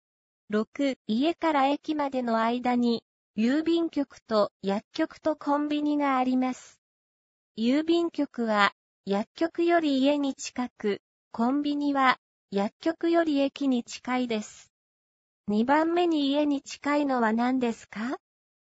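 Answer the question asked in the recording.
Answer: 薬局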